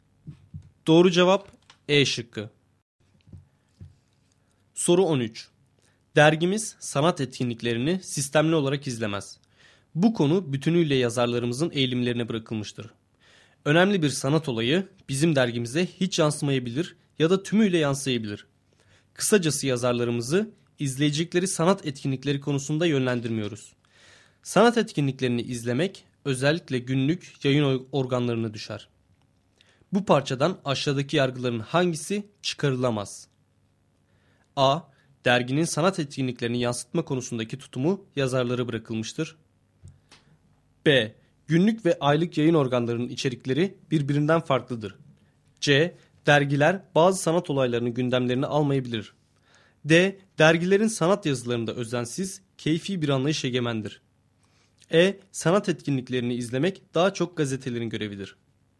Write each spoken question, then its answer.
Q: Bu parçadan aşağıdaki yargıların hangisi çıkarılamaz?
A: Doğru cevap D şıkkı.